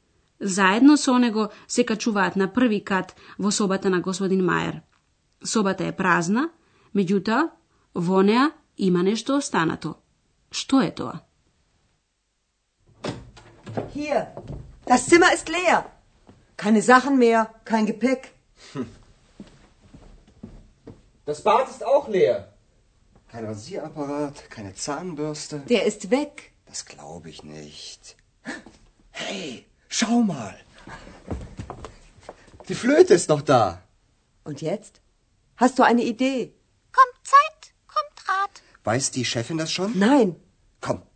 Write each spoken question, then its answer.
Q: Што е тоа?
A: Во собата останала флейтата на господин Мајер.